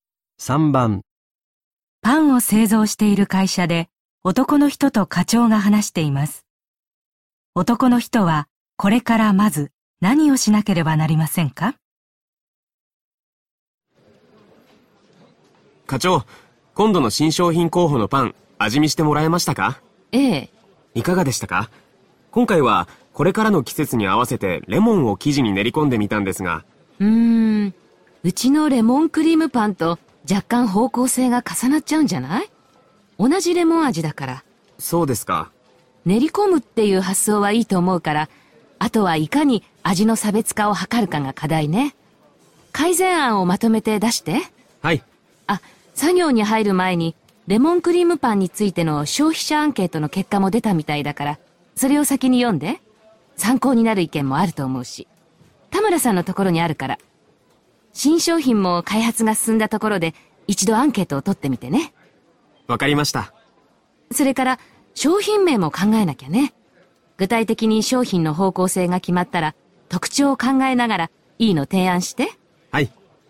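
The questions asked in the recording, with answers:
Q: 男の人はこれからまず何をしなければなりませんか?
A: レモンクリームパンの消費者アンケートの結果を読む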